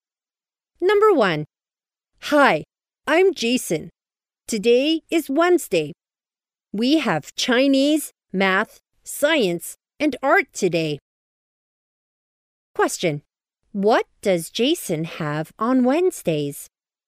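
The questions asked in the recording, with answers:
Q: What does Jason have on Wednesdays?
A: Chinese, math, science and art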